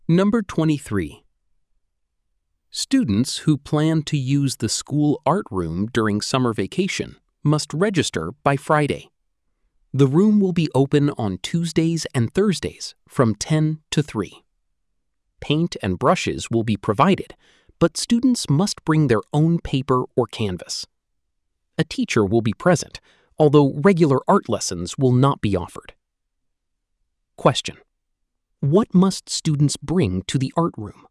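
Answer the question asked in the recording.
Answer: Their own paper or canvas.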